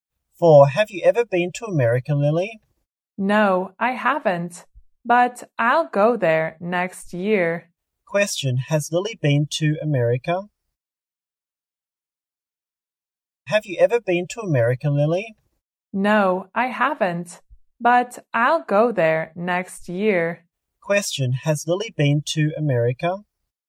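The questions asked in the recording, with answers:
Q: Has Lily been to America?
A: No, she hasn't.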